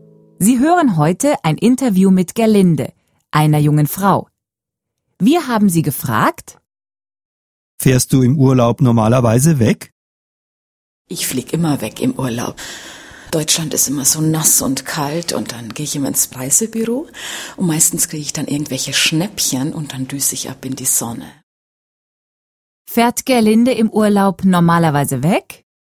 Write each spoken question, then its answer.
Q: Fährt Gerlinde im Urlaub normalerweise weg?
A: Ja, Gerlinde fährt immer im Urlaub weg.